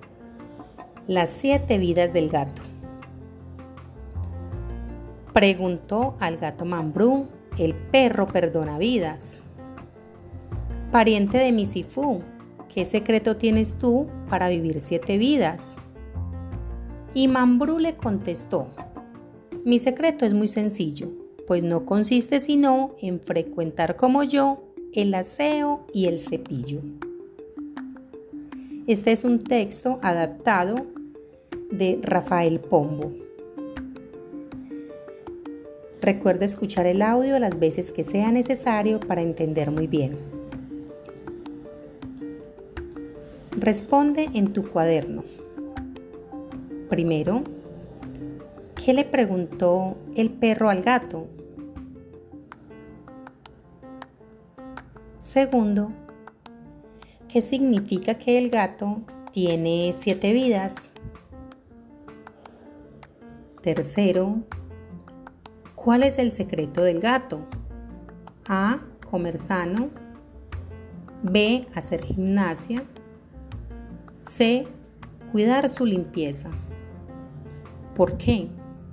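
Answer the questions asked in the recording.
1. Qué secreto tiene para vivir siete vidas
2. C: Cuidar su limpieza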